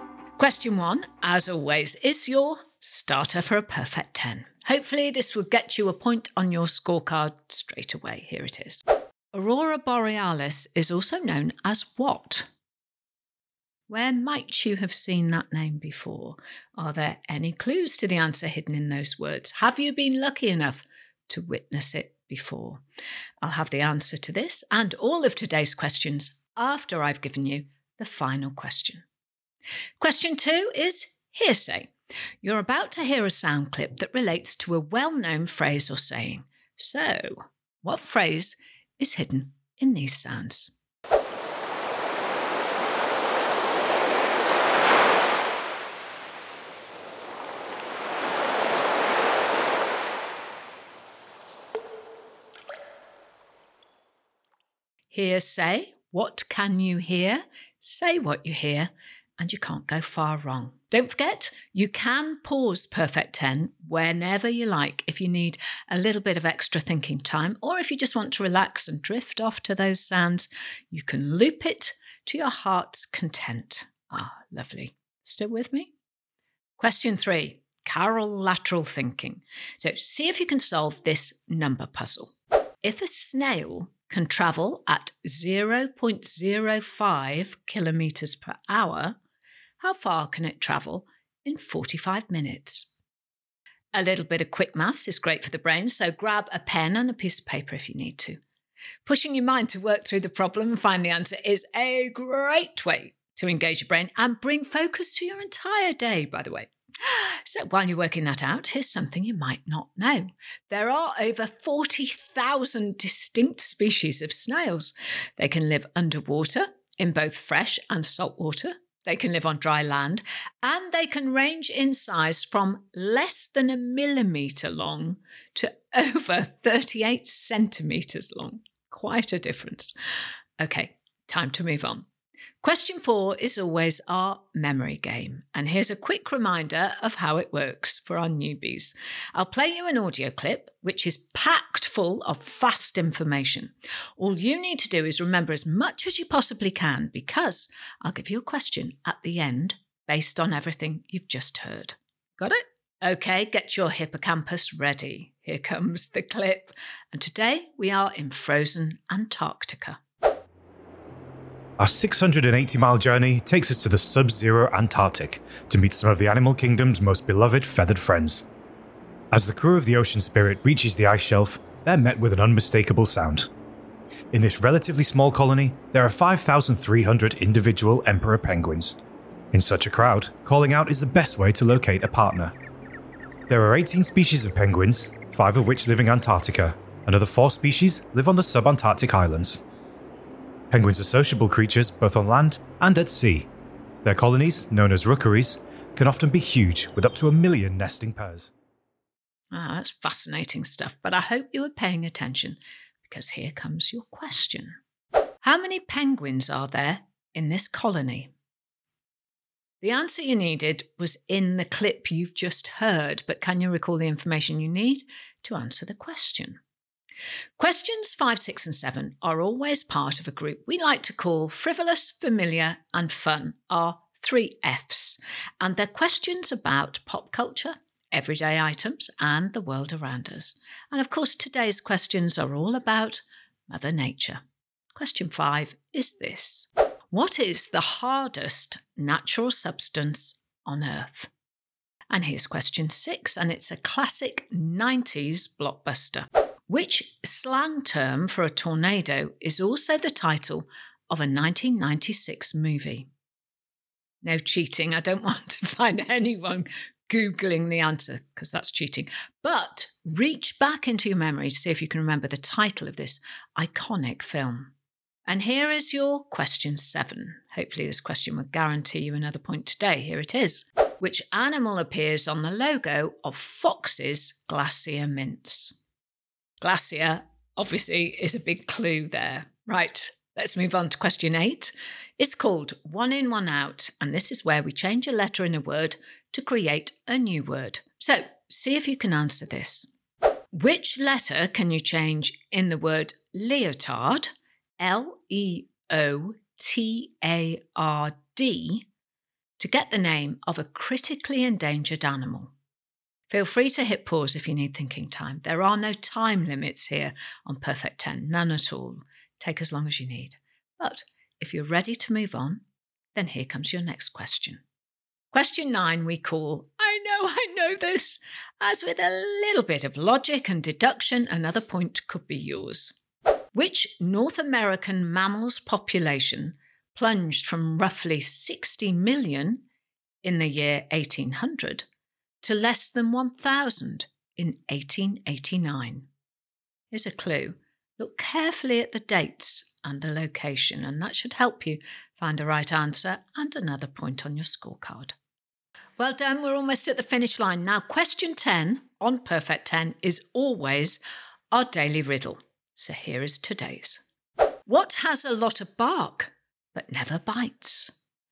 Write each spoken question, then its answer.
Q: How many penguins are there in this colony?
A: The answer was 5,300 individual penguins.